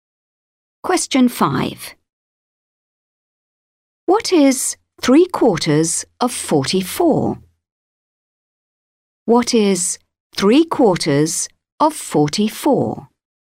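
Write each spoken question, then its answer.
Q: What is 3/4 of 44?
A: 33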